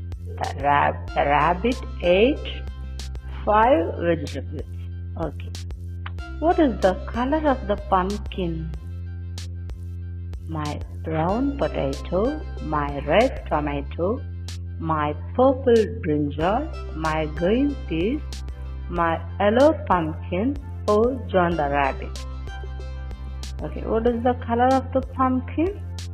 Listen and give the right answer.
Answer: The color of the pumpkin is yellow.